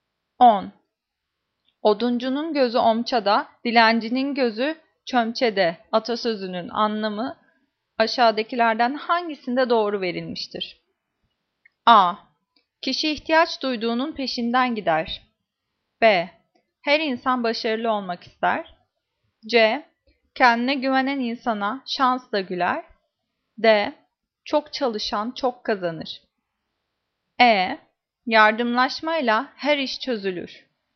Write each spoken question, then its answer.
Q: Oduncunun gözü omçada, dilencinin gözü çömçede atasözünün anlamı aşağıdakilerden hangisinde doğru verilmiştir?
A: Cevap A. Kişi ihtiyaç duyduğunun peşinden gider.